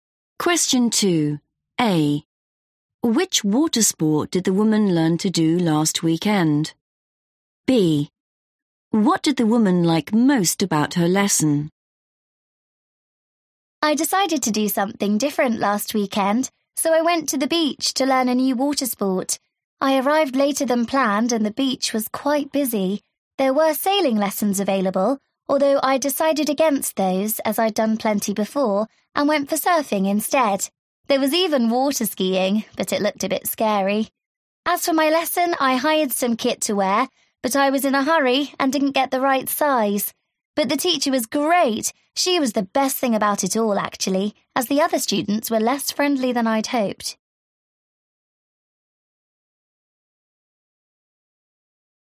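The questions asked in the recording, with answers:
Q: Which water sport did the woman learn to do last weekend?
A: surfing

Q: What did the woman like most about her lesson?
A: the teacher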